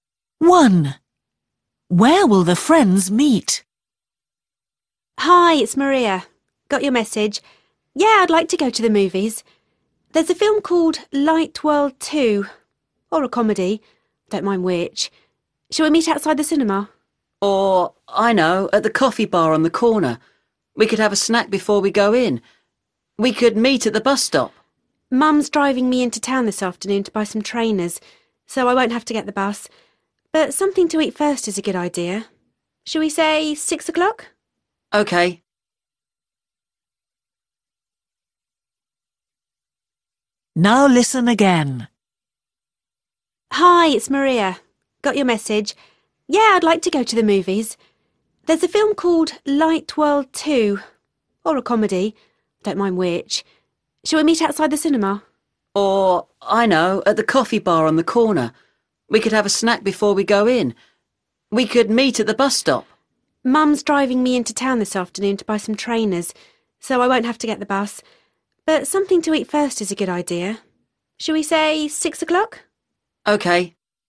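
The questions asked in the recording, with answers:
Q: Where will the friends meet?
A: at the coffee bar on the corner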